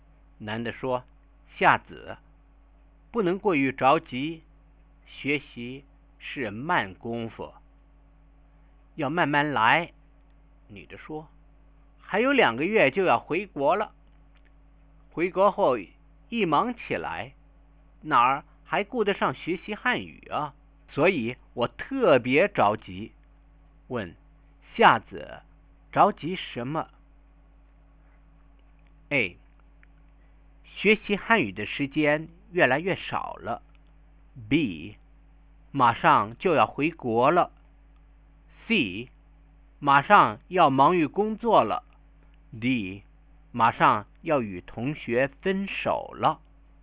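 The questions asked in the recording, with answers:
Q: 夏子,着急什么?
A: A: 学习汉语的时间越来越少了。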